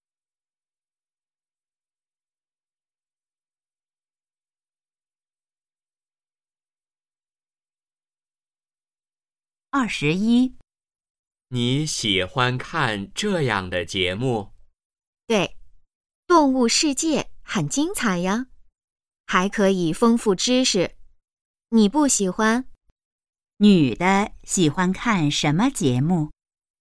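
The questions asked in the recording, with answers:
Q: 女的喜欢看什么节目?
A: 动物世界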